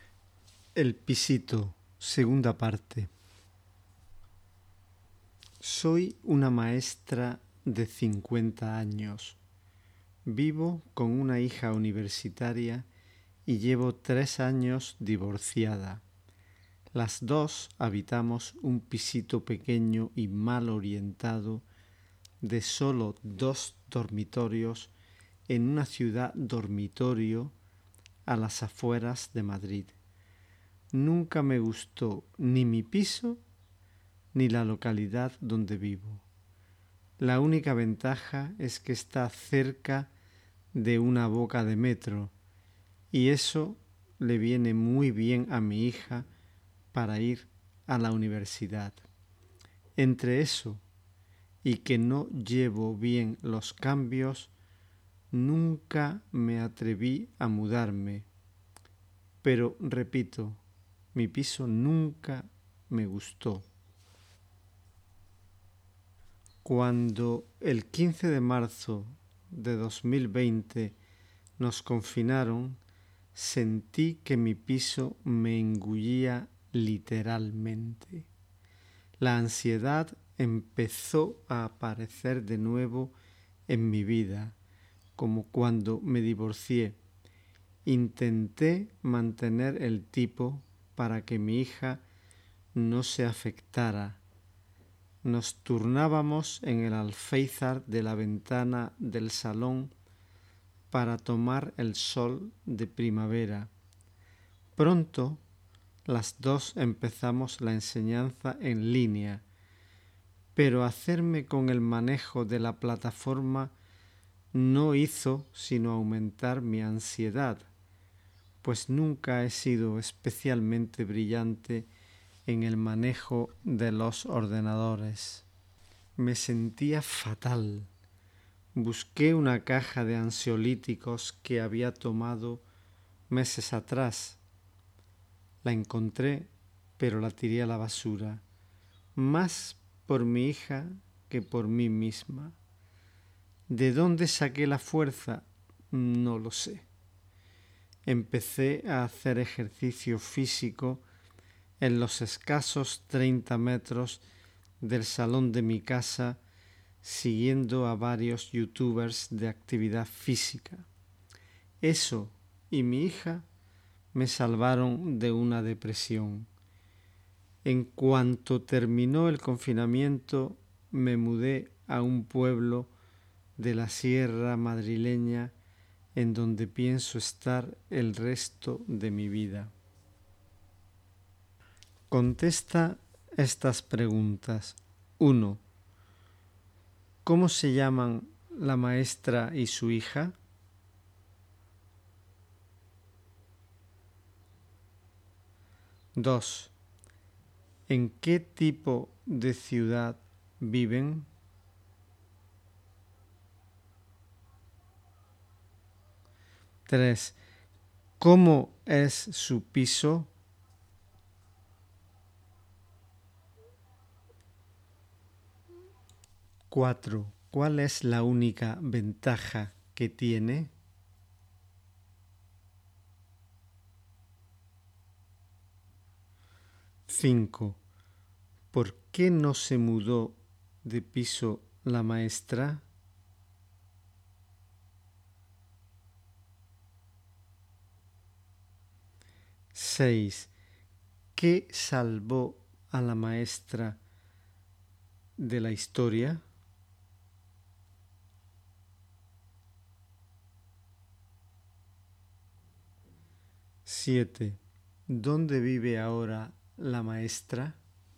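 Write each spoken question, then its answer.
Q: ¿En qué tipo de ciudad viven?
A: En una ciudad dormitorio a las afueras de Madrid

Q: ¿Cómo es su piso?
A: Pequeño, mal orientado, de solo 2 dormitorios

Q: ¿Cuál es la única ventaja que tiene?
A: Está cerca de una boca de metro

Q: ¿Por qué no se mudó de piso la maestra?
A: Por el metro para su hija y porque no lleva bien los cambios

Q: ¿Qué salvó a la maestra de la historia?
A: El ejercicio físico y su hija

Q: ¿Dónde vive ahora la maestra?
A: En un pueblo de la sierra madrileña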